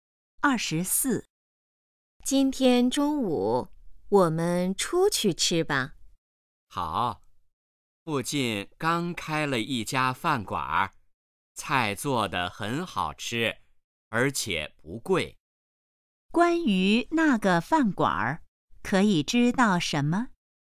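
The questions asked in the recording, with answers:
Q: 关于那个饭馆,可以知道什么?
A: 菜好吃而且不贵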